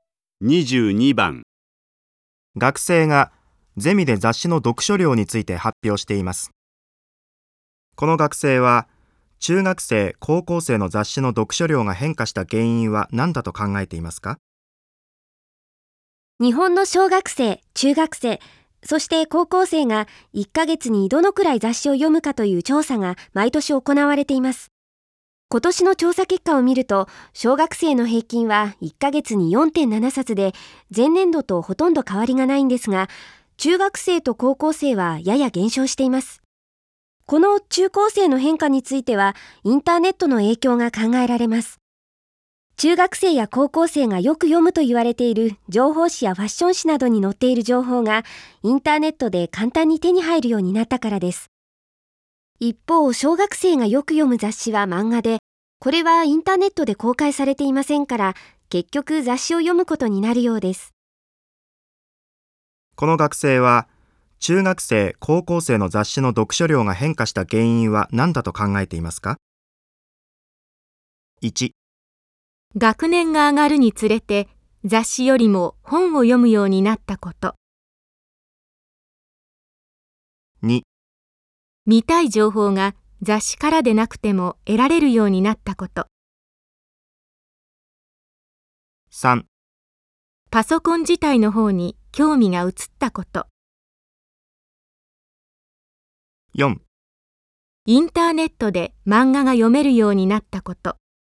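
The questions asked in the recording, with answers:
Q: この学生は、中学生、高校生の雑誌の読書量が変化した原因は何だと考えていますか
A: 2: 見たい情報が雑誌からでなくても得られるようになったこと。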